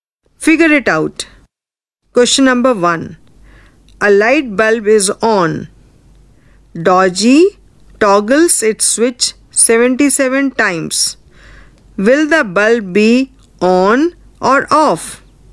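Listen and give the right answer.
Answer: Off (77 toggles is an odd number)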